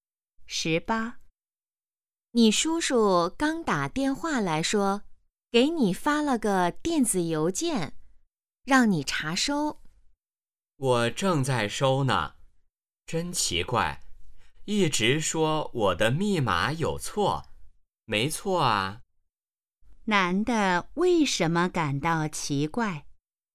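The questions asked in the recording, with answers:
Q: 男的为什么感到奇怪?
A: 收邮件时一直提示密码有错,可他觉得密码没错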